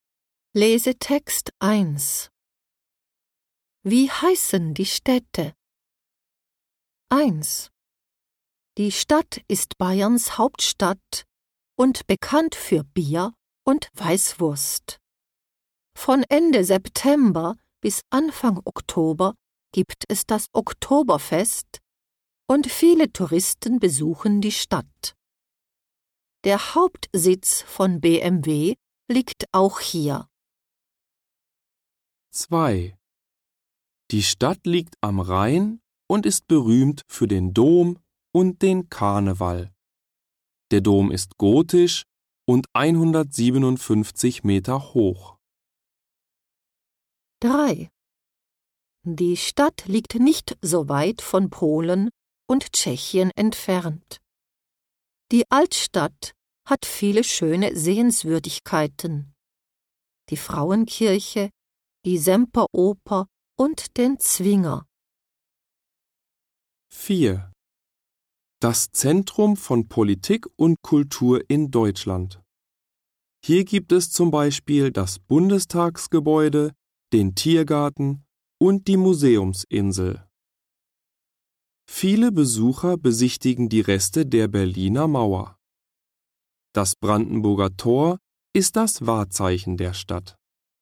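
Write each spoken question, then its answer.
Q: Wie heißen die Städte?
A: München

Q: Wie heißen die Städte?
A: Köln

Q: Wie heißen die Städte?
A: Dresden

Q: Wie heißen die Städte?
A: Berlin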